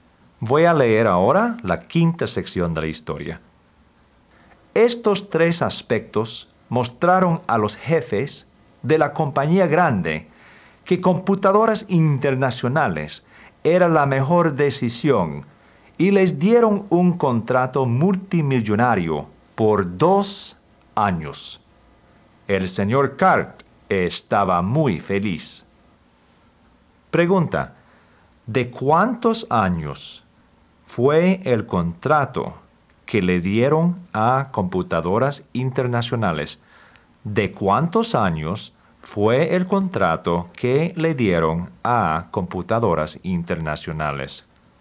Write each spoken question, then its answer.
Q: ¿de cuántos años fue el contrato que le dieron a Computadoras Internacionales?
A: De dos años.